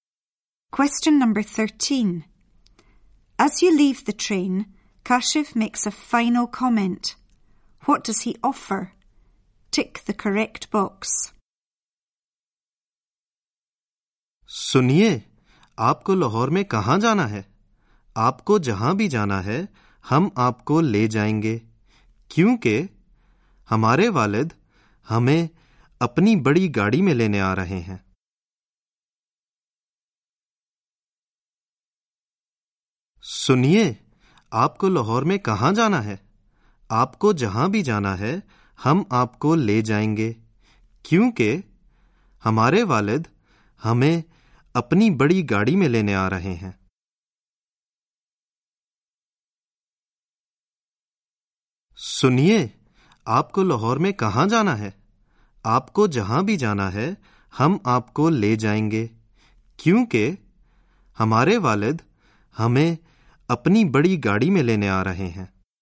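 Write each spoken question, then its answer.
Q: What does he offer?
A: To take you wherever you need to go in Lahore in their father's car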